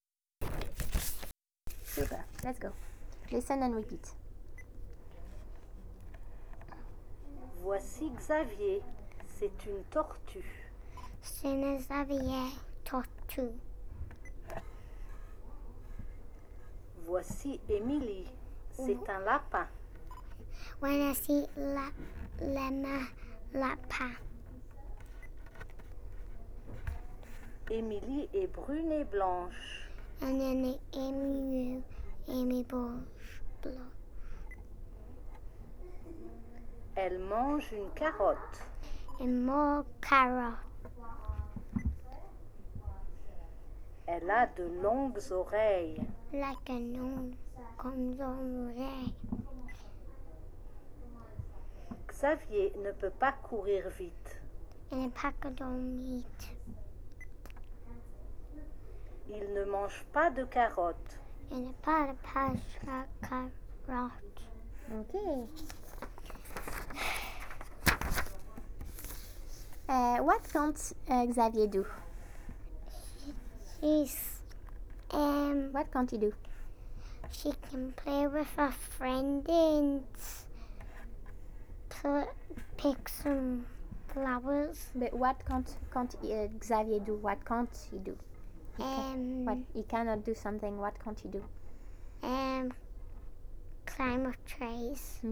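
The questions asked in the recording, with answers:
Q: What can't Xavier do?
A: Run fast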